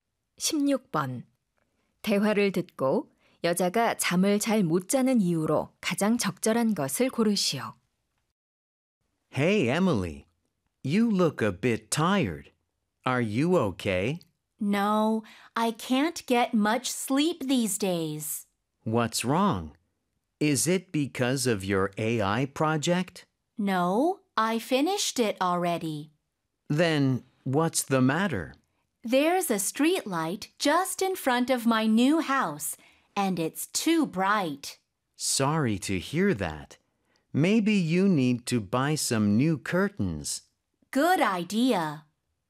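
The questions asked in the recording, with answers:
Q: 대화를 듣고 여자가 잠을 잘 못 자는 이유로 가장 적절한 것을 고르시오.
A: 집 앞 가로등이 너무 밝아서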